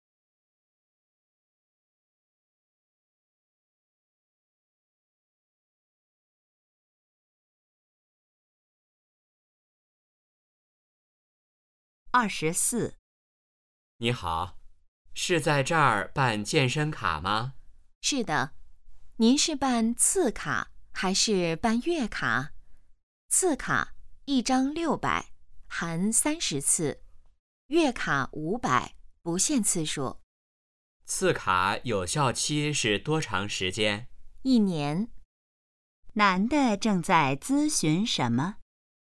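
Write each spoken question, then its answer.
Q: 男的正在咨询什么?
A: 办健身卡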